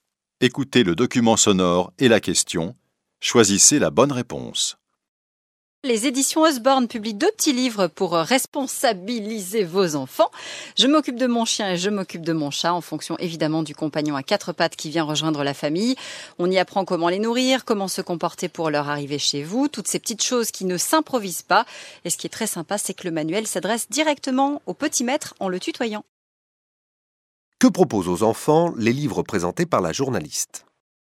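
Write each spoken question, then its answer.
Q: Que proposent aux enfants les livres présentés par la journaliste ?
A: Des conseils pour s'occuper de leur chien ou de leur chat (comment les nourrir, comment se comporter à leur arrivée).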